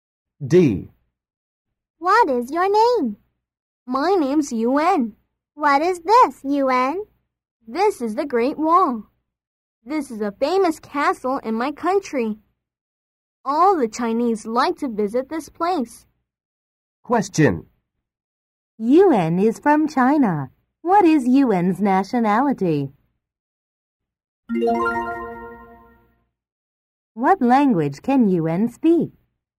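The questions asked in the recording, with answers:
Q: Yuan is from China. What is Yuan's nationality?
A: Chinese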